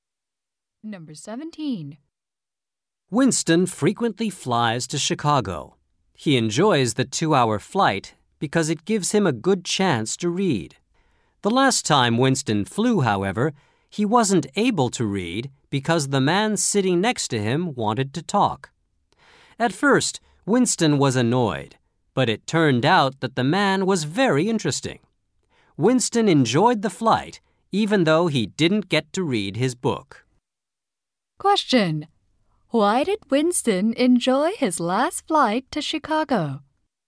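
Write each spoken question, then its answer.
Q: Why did Winston enjoy his last flight to Chicago?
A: The man sitting next to him was very interesting.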